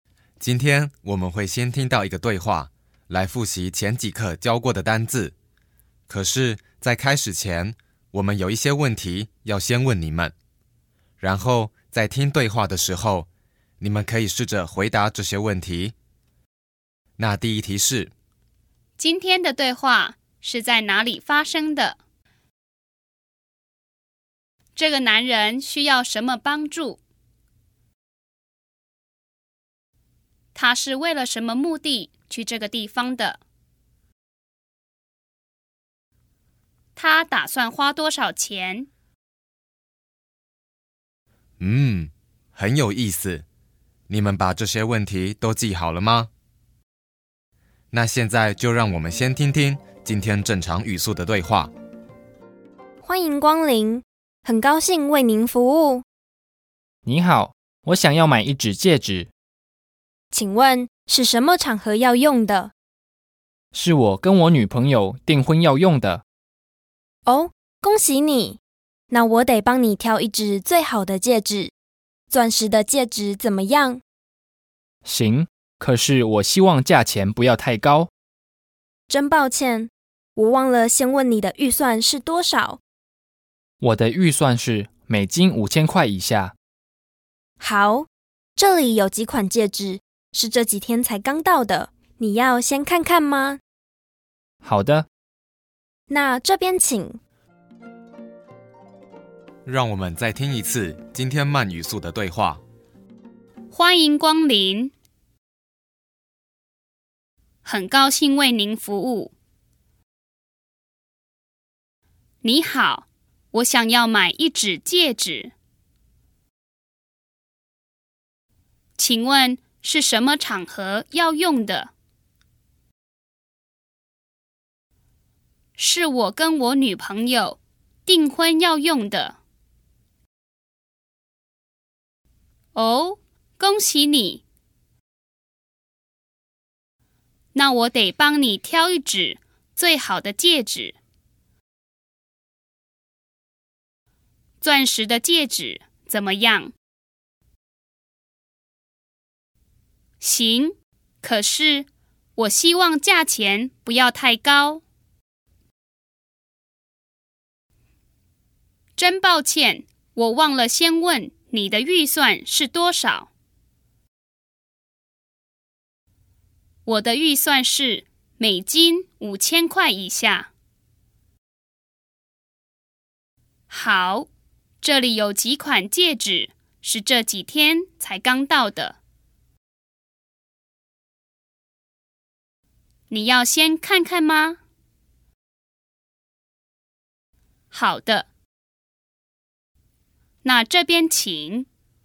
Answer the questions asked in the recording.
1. 那他应该是在一家饰品店或是百货公司里的饰品区。
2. 啊,所以他要买的东西是戒指。
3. 是我跟我女朋友订婚要用的。
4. 我的预算是美金5000块以下。